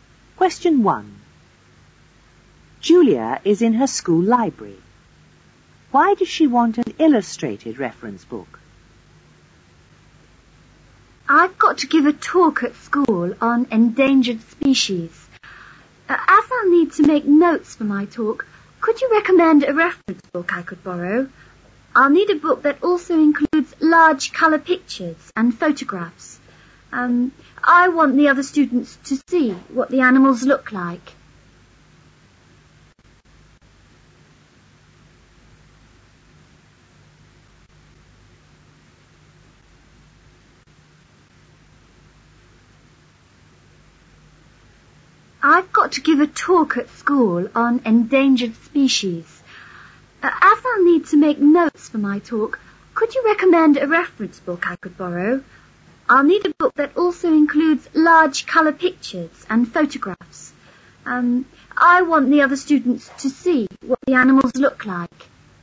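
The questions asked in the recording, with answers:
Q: Why does she want an illustrated reference book?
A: So the other students can see what the animals look like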